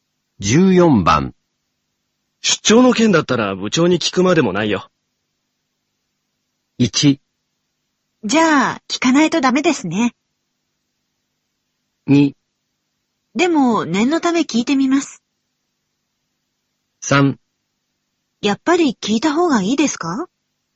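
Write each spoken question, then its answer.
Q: 出張の件だったら部長に聞くまでもないよ。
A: 2: でも、念のため聞いてみます。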